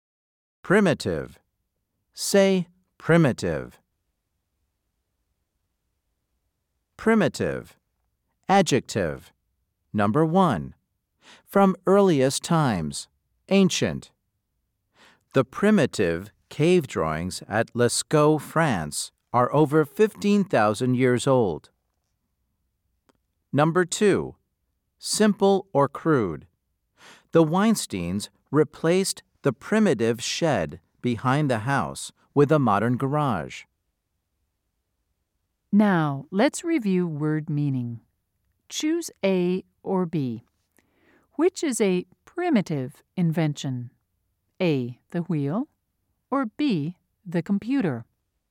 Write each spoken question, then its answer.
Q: Choose A or B. Which is a primitive invention?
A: If you said A, you were correct.